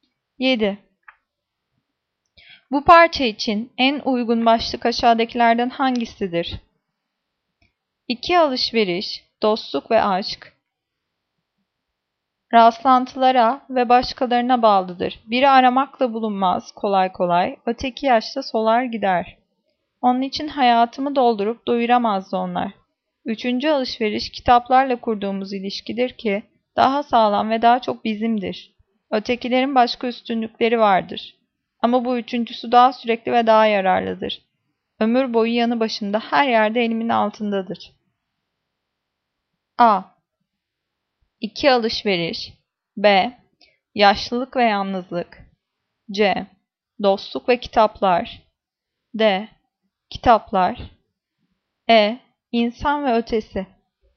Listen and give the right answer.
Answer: Cevap D. Kitaplar.